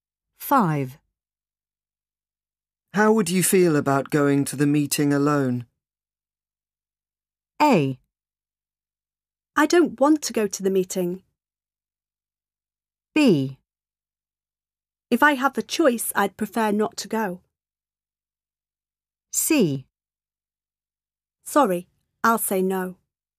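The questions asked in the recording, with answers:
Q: How would you feel about going to the meeting alone?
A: B: If I have the choice, I'd prefer not to go.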